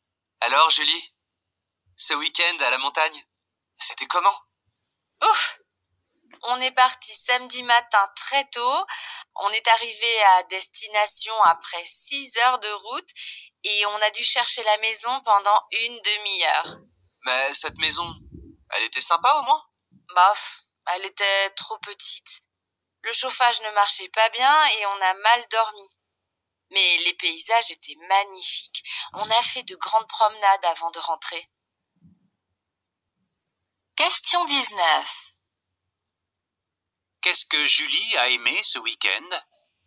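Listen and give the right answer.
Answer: Les paysages (magnifiques)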